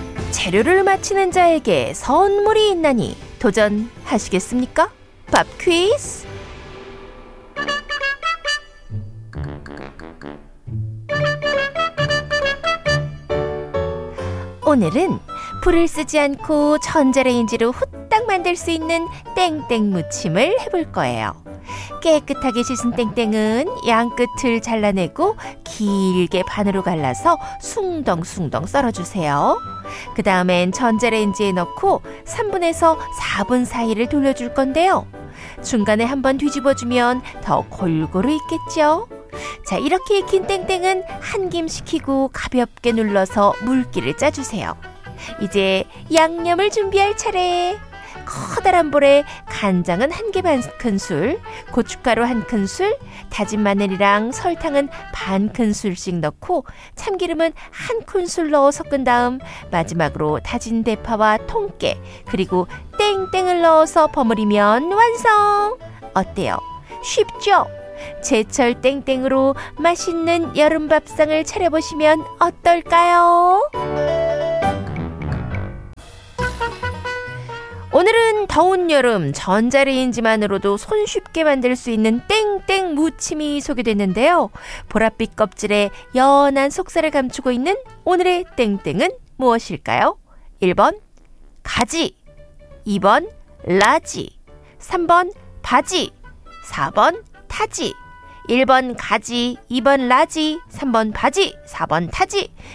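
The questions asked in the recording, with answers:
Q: 보랏빛 껍질에 연한 속살을 감추고 있는 오늘의 땡땡은 무엇일까요?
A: 1: 가지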